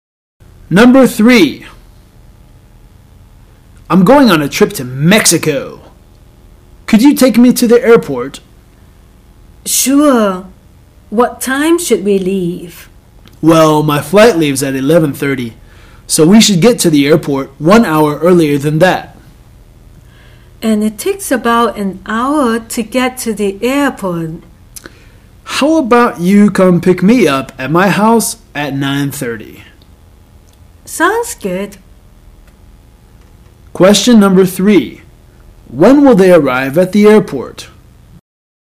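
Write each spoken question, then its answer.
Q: When will they arrive at the airport?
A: At 10:30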